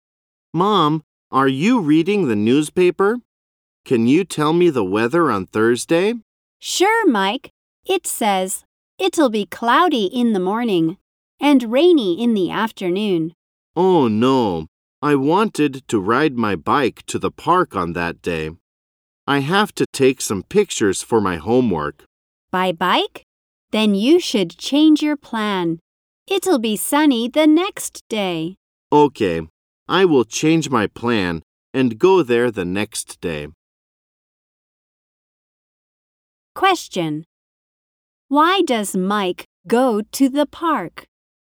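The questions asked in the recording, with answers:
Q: Why does Mike go to the park?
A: To take some pictures for his homework.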